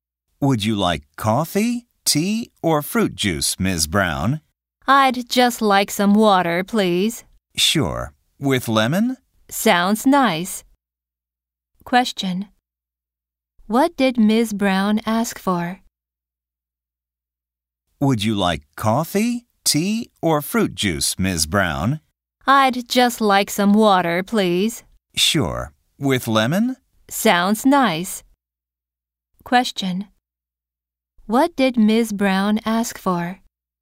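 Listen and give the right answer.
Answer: Water with lemon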